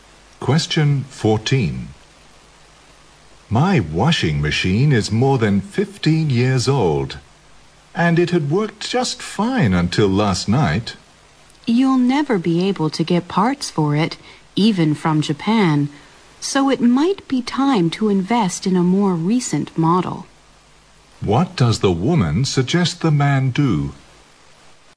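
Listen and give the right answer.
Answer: Buy a newer washing machine.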